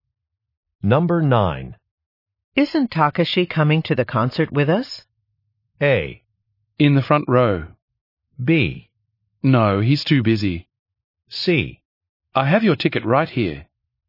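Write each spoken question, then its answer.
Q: Isn't Takashi coming to the concert with us?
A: B: No, he's too busy.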